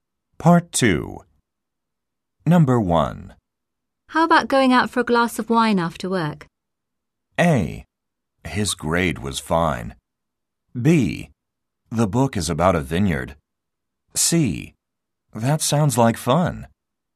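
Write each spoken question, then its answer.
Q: How about going out for a glass of wine after work?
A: C: That sounds like fun.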